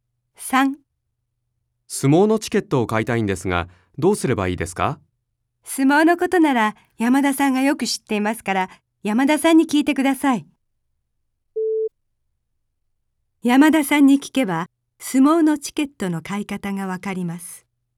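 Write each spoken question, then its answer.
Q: 山田さんに聞けば、相撲のチケットの買い方がわかります。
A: ○(正しい)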